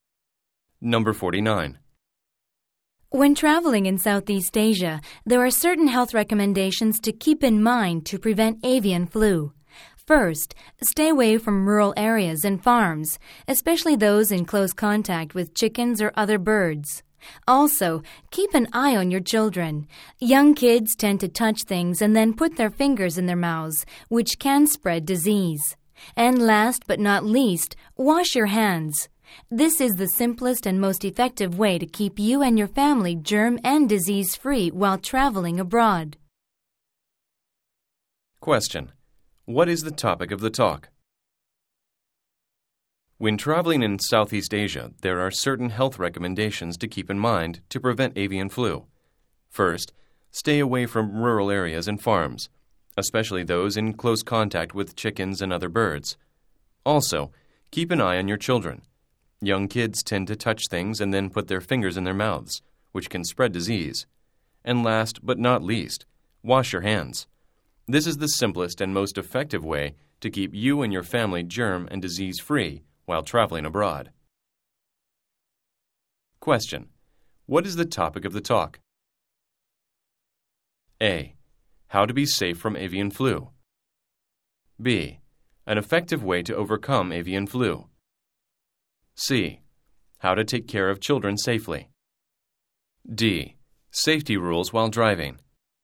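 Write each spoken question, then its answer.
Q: What is the topic of the talk?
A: A: How to be safe from avian flu.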